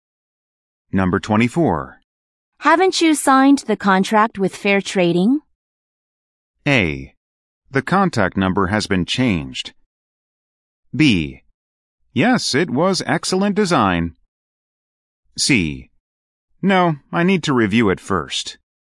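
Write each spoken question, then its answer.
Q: Haven't you signed the contract with Fair Trading?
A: C: No, I need to review it first.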